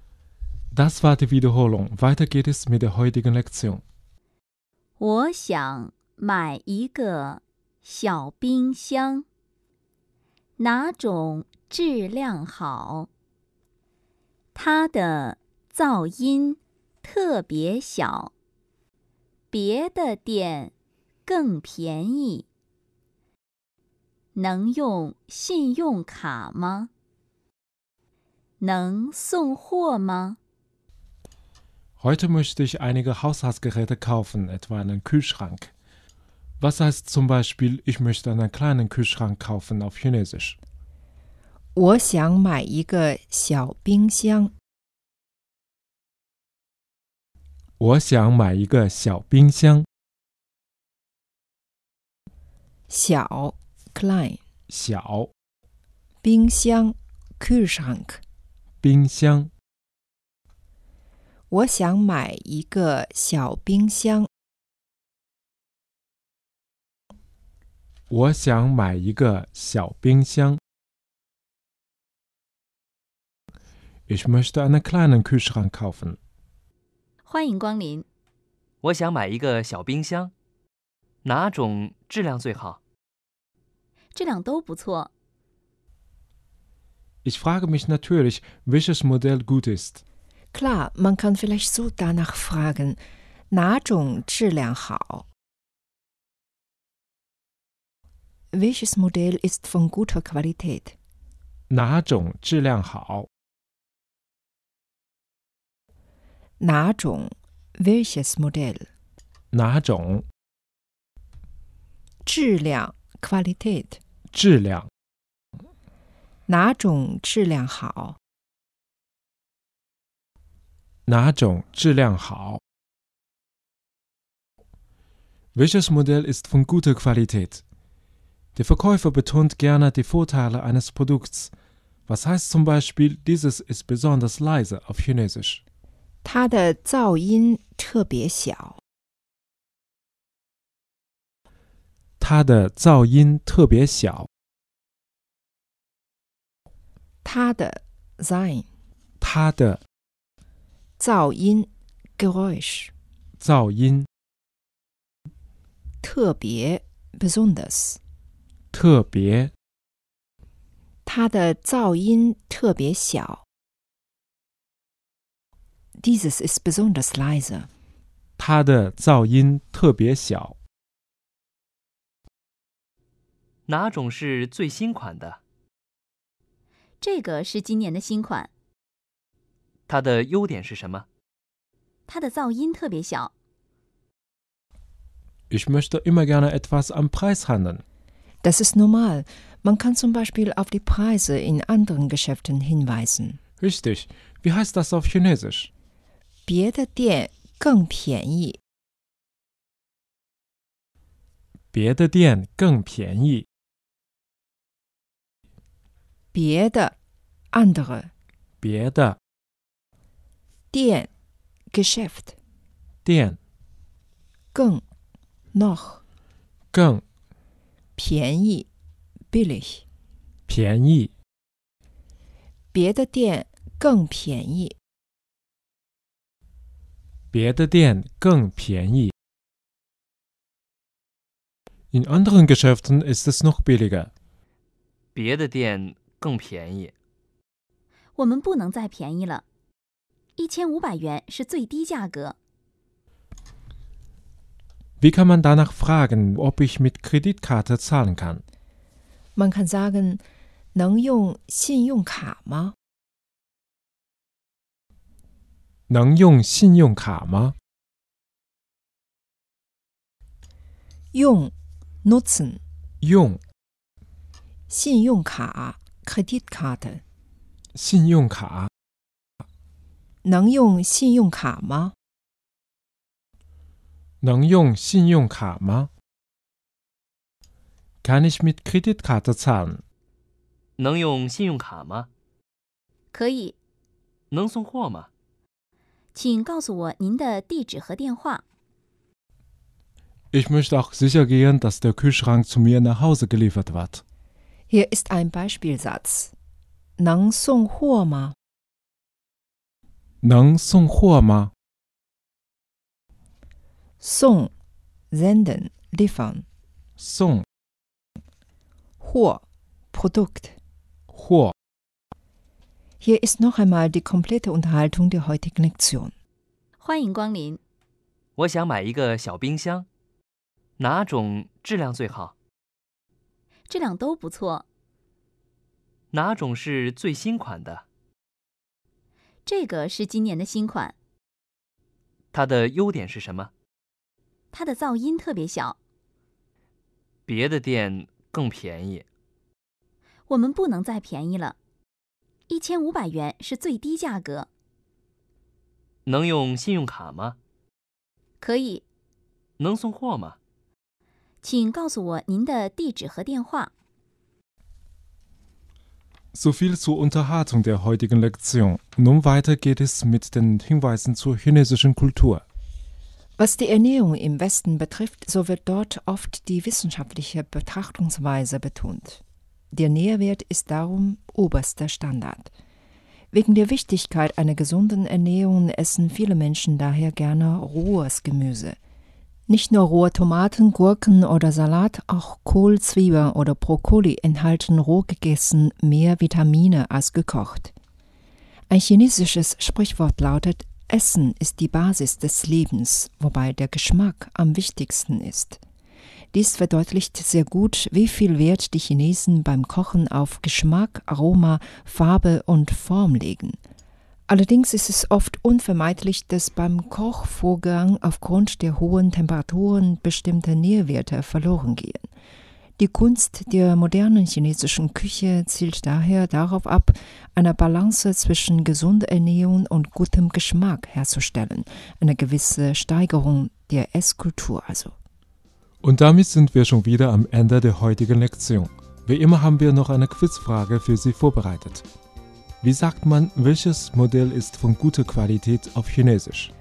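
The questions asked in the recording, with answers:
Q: Wie sagt man, welches Modell ist von guter Qualität auf Chinesisch?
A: 哪种质量好?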